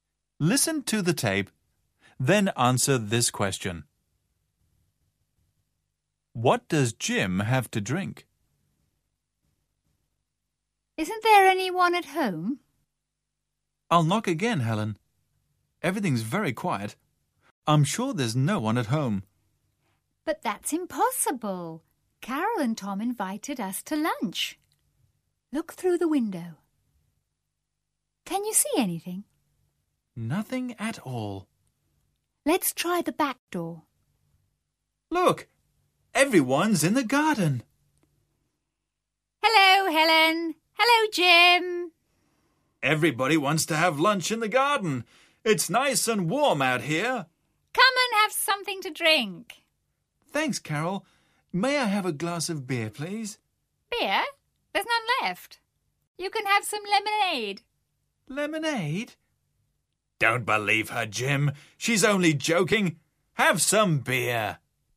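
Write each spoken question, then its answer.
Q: What does Jim have to drink?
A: Beer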